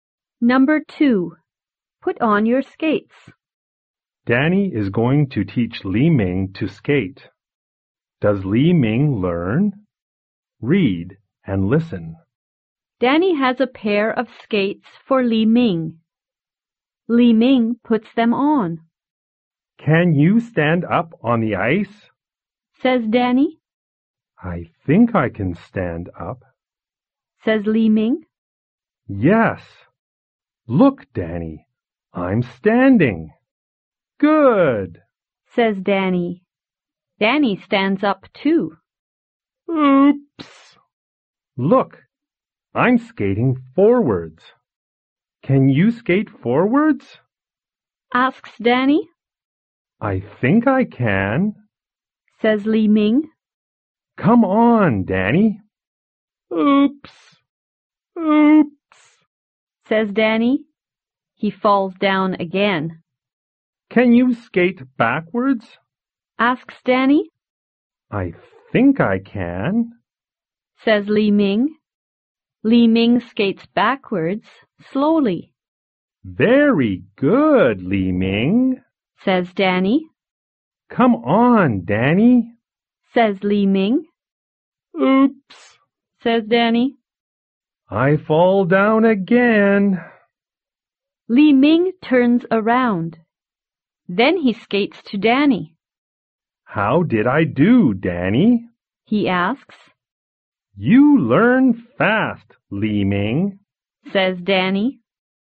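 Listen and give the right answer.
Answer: Yes, he learns fast.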